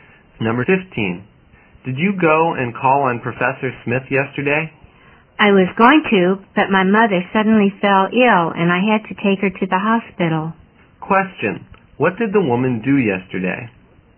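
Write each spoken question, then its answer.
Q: what did the woman do yesterday?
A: She took her sick mother to the hospital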